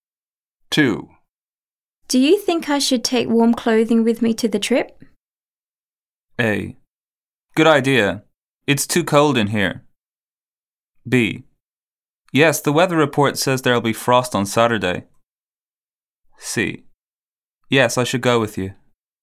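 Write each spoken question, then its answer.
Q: Do you think I should take warm clothing with me to the trip?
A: B: Yes, the weather report says there'll be frost on Saturday.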